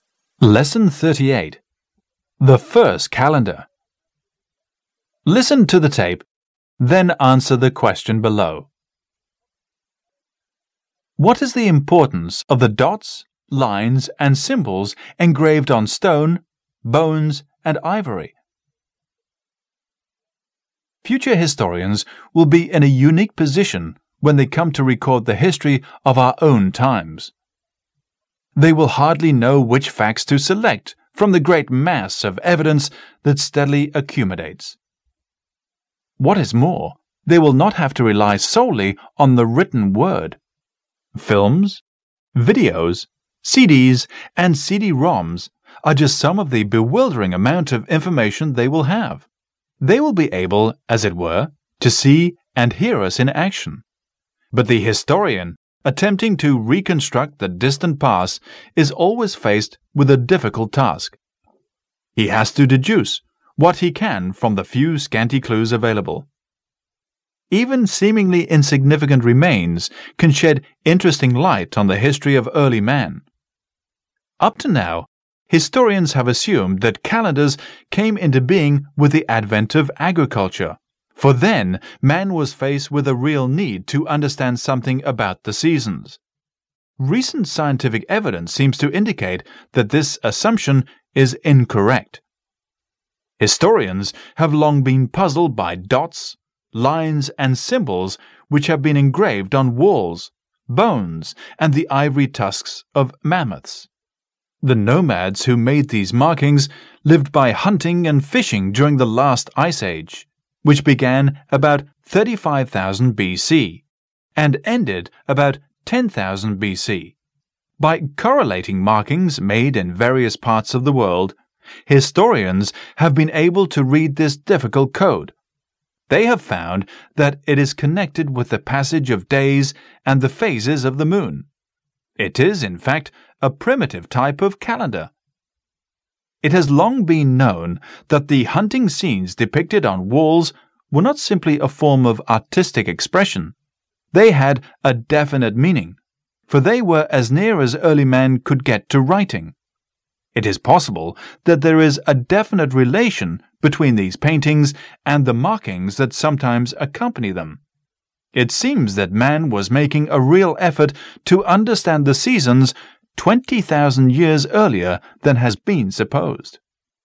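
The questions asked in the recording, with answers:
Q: What is the importance of the dots, lines, and symbols engraved on stone, bones, and ivory?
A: They are a primitive calendar, connected with the passage of days and the phases of the moon, showing man tried to understand the seasons 20,000 years earlier than supposed.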